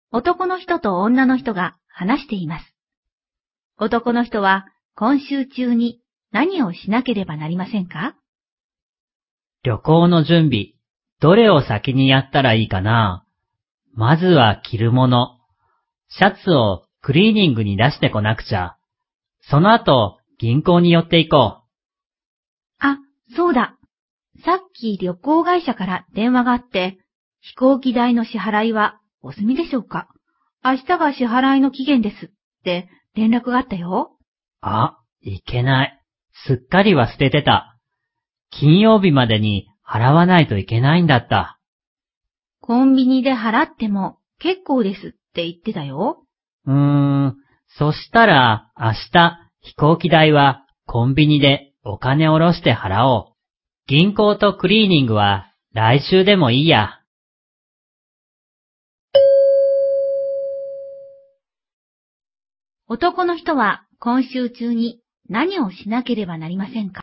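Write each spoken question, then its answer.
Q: 男の人は今週中に何をしなければなりませんか?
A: 飛行機代を払う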